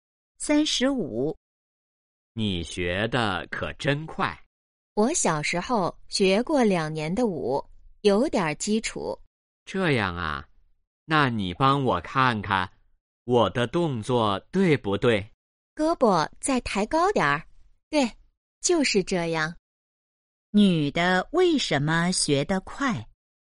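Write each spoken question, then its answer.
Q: 女的为什么学得快?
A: 小时候学过两年舞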